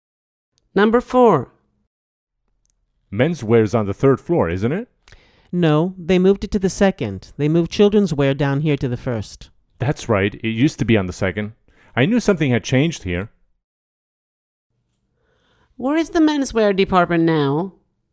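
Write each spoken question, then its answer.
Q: Where is the menswear department now?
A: On the second floor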